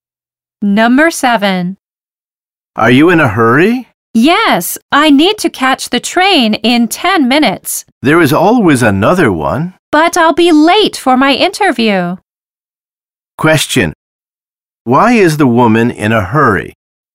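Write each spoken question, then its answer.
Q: Why is the woman in a hurry?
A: She needs to catch a train so she won't be late for her interview.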